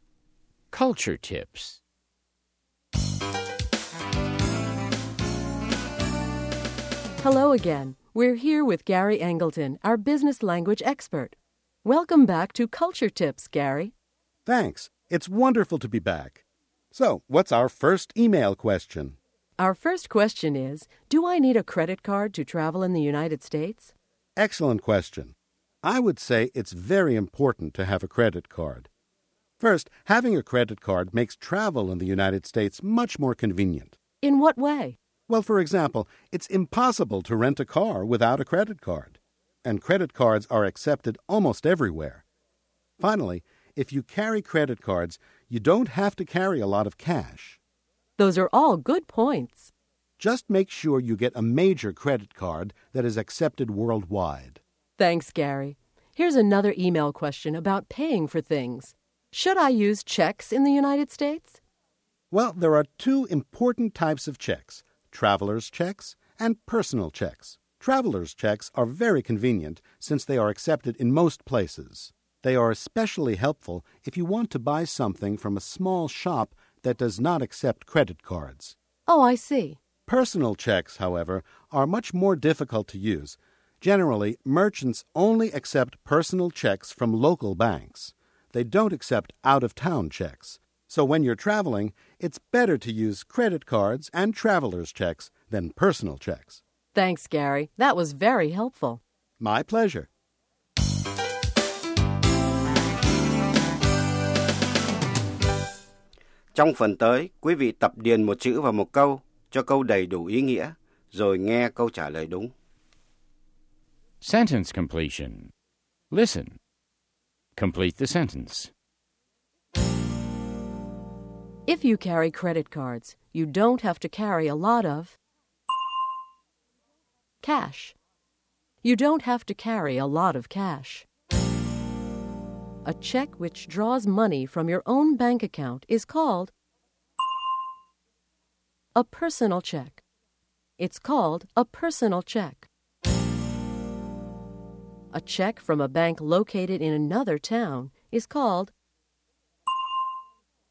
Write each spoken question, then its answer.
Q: A check from a bank located in another town is called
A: an out-of-town check. It's called an out-of-town check.